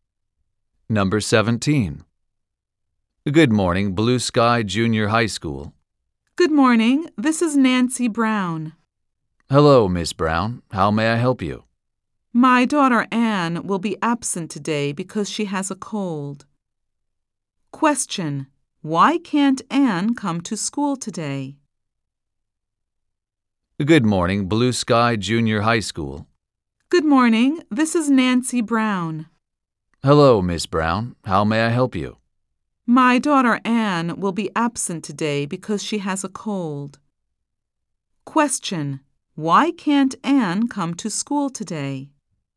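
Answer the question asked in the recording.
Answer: Because she has a cold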